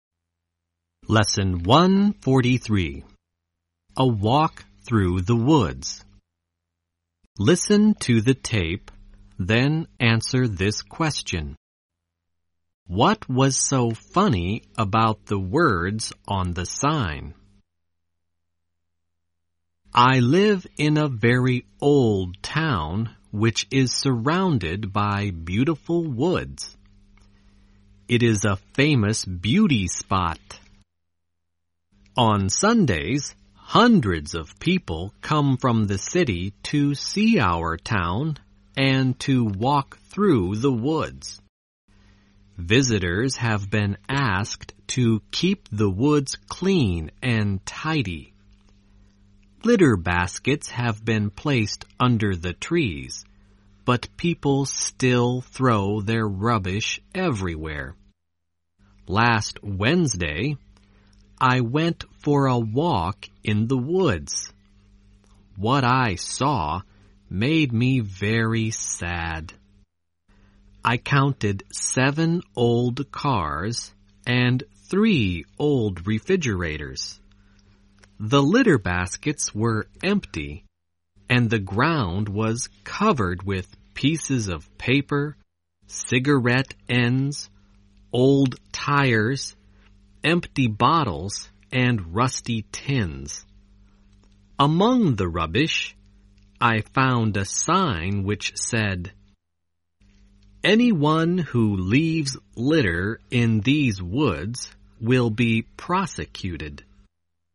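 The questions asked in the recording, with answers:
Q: What was so funny about the words on the sign?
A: The sign warning that litter-droppers would be prosecuted was itself lying among the rubbish.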